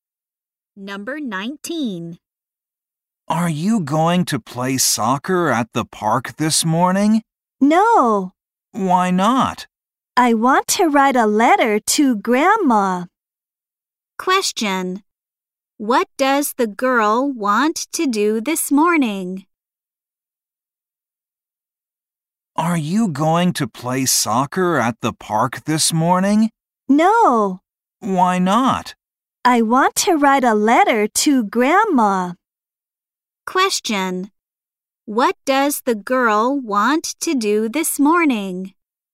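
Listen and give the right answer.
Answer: Write a letter to her grandma.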